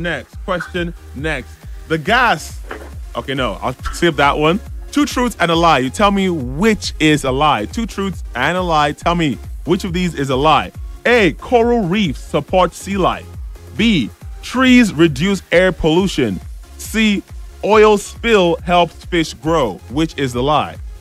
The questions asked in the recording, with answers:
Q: Tell me which of these is a lie.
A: But I think you want to say C, the last one?